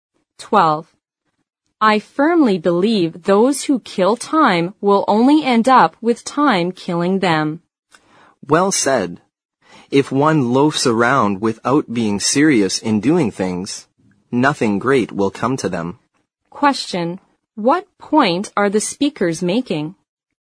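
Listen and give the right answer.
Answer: People should not waste their time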